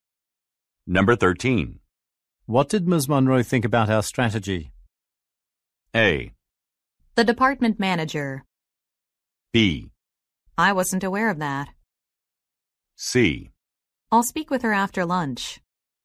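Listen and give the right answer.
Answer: C: I'll speak with her after lunch.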